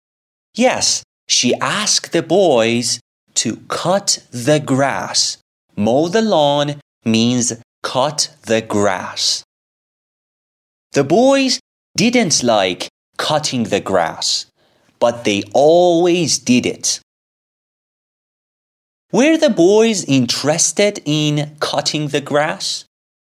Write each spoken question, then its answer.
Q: Were the boys interested in cutting the grass?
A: No, the boys weren't interested in cutting the grass.